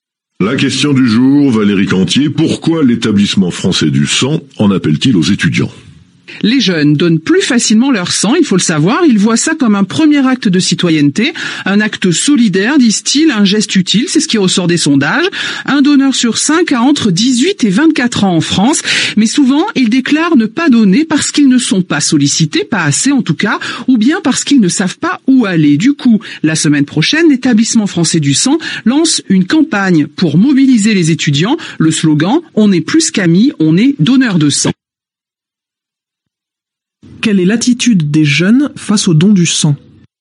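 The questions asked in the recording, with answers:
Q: Quelle est l'attitude des jeunes face au don du sang ?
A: Ils donnent plus facilement leur sang et le voient comme un acte citoyen et solidaire, mais ils disent ne pas être assez sollicités.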